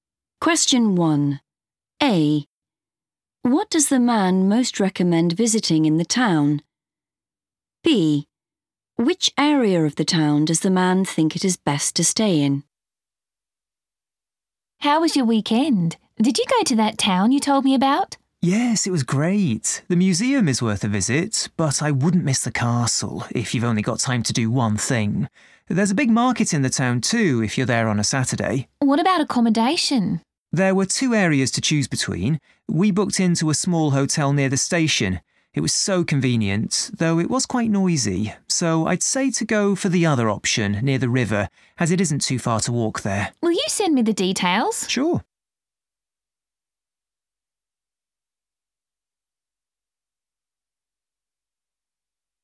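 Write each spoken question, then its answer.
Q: What does the man most recommend visiting in the town?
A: the castle

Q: Which area of the town does the man think it is best to stay in?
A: near the river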